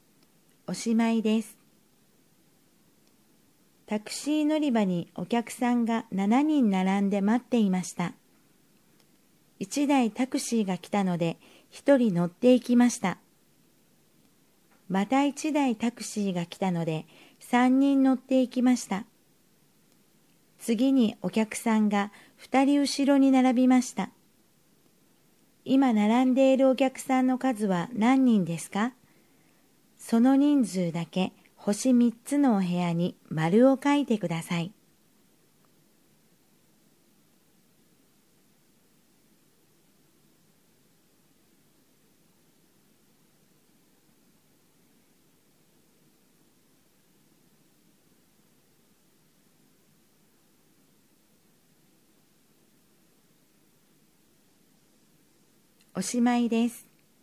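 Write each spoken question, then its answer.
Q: 今並んでいるお客さんの数は何人ですか?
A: 5人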